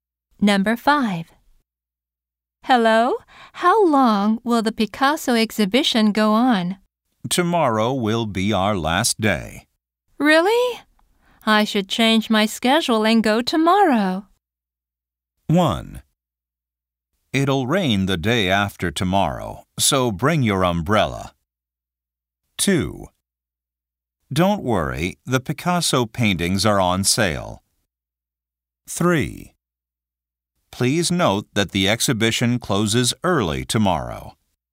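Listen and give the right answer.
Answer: 3: Please note that the exhibition closes early tomorrow.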